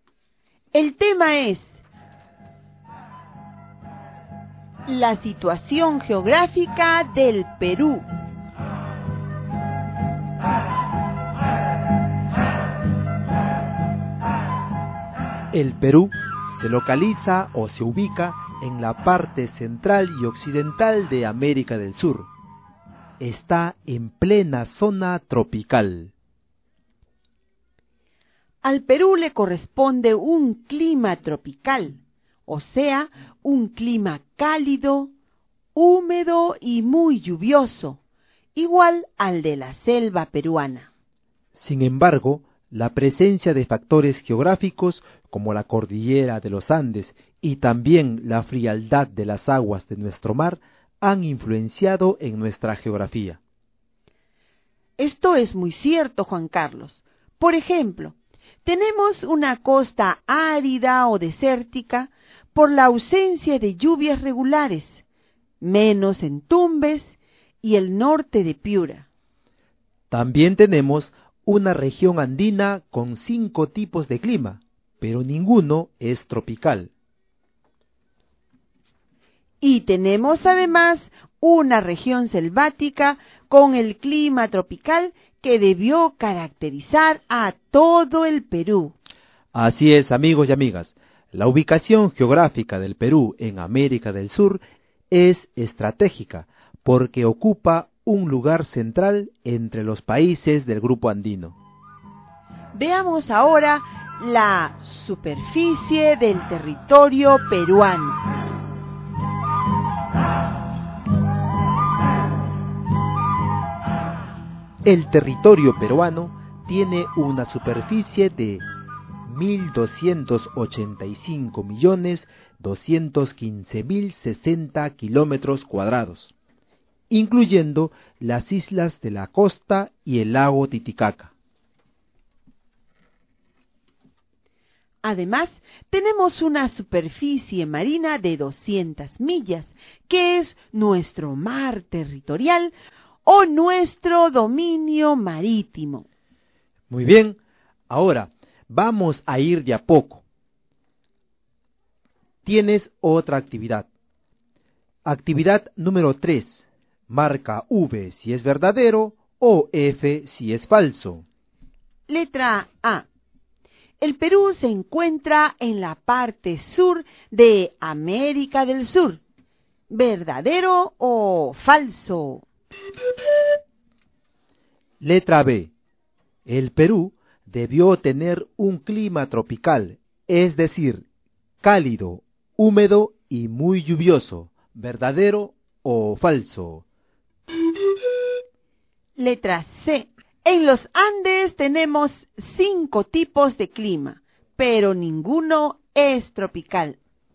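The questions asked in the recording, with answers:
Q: Letra A. El Perú se encuentra en la parte sur de América del Sur.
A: Falso

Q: Letra B. El Perú debió tener un clima tropical, es decir, cálido, húmedo y muy lluvioso.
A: Verdadero

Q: Letra C. En los Andes tenemos 5 tipos de clima, pero ninguno es tropical.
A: Verdadero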